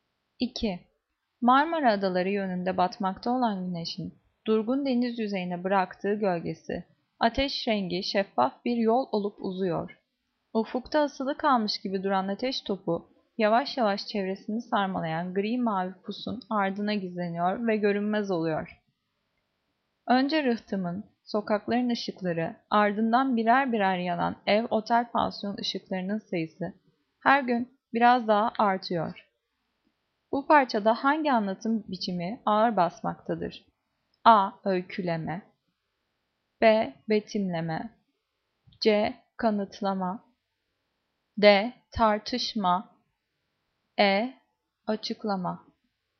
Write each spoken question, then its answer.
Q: Bu parçada hangi anlatım biçimi ağır basmaktadır?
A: Cevap B. Betimleme.